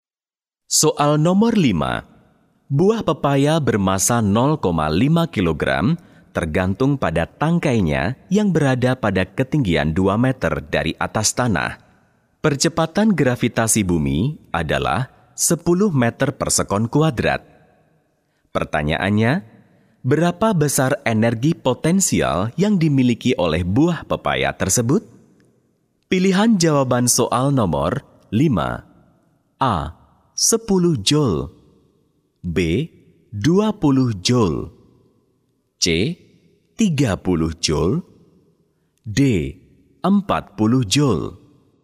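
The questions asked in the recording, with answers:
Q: Pertanyaannya, berapa besar energi potensial yang dimiliki oleh buah pepaya tersebut?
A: A: 10 joule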